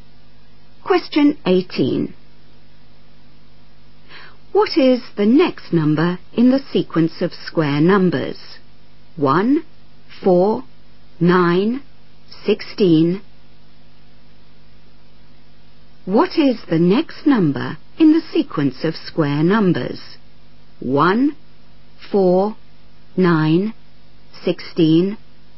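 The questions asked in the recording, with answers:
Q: What is the next number in the sequence of square numbers?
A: 25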